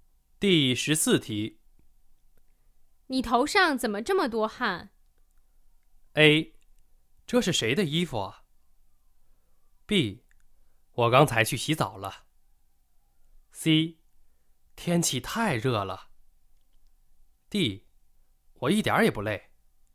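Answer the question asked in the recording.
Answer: C: 天气太热了。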